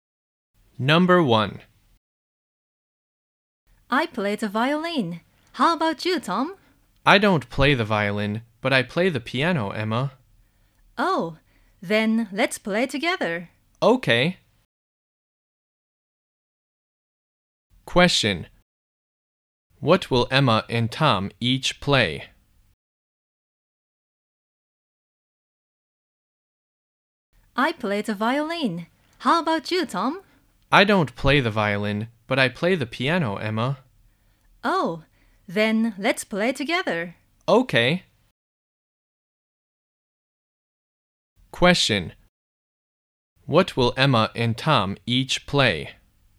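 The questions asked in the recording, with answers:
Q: What will Emma and Tom each play?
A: Emma will play the violin and Tom will play the piano.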